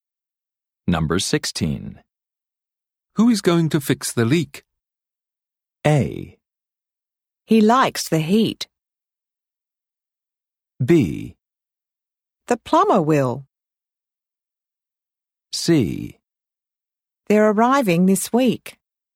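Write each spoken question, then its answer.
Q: Who is going to fix the leak?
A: B: The plumber will.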